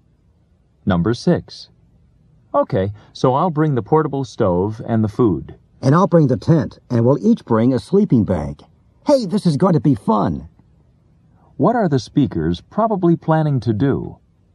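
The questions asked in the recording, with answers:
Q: What are the speakers probably planning to do?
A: Go camping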